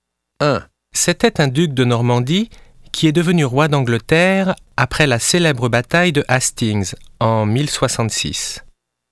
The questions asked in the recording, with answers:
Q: C'était un duc de Normandie qui est devenu roi d'Angleterre après la célèbre bataille de Hastings en 1066.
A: C'est Guillaume le Conquérant. Il est du XIe siècle.